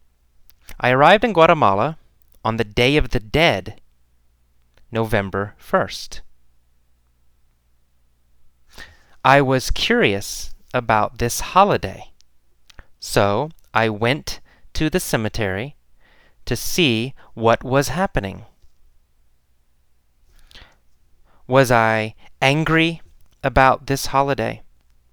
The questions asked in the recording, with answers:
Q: Was I angry about this holiday?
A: No, I wasn't angry about this holiday.